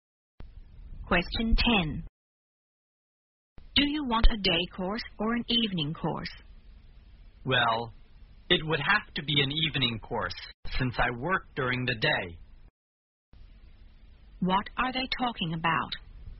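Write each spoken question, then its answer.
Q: What are they talking about?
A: Whether to take a day course or an evening course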